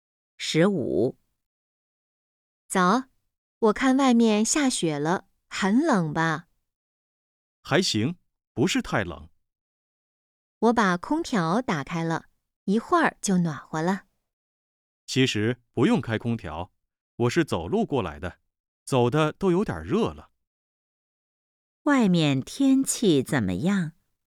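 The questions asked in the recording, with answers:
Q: 外面天气怎么样?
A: 下雪了,不太冷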